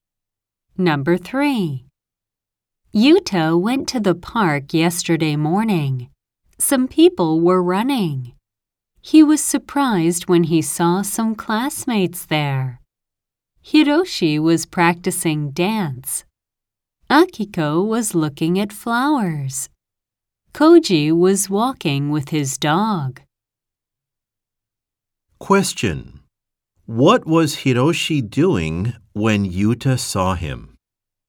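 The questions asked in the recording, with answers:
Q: What was Hiroshi doing when Yuta saw him?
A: He was practicing dance.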